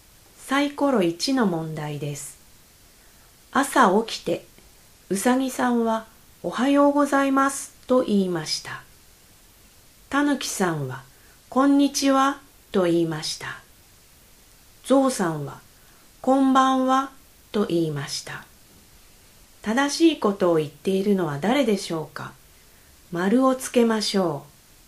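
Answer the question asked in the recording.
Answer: うさぎさん(おはようございます)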